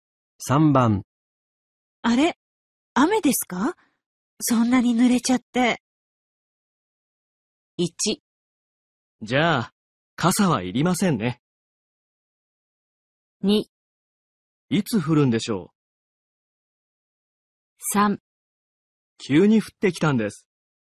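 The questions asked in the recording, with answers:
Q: あれ雨ですかそんなに濡れちゃって。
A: 3: 急に降ってきたんです。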